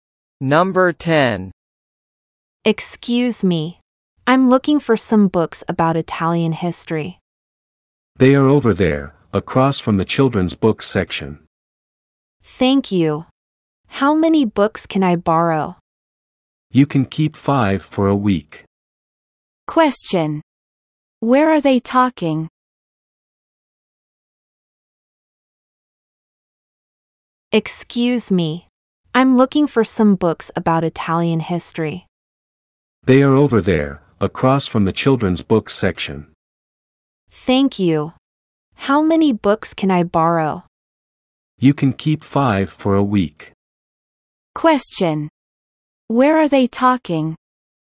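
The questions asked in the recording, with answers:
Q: Where are they talking?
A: At a library.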